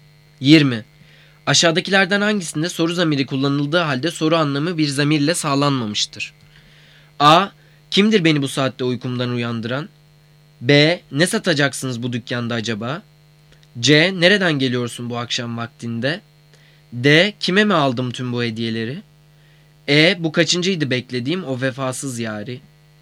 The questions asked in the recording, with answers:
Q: Aşağıdakilerden hangisinde soru zamiri kullanıldığı halde soru anlamı bir zamirle sağlanmamıştır?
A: Cevap D. Kime mi aldım bu tüm hediyeleri?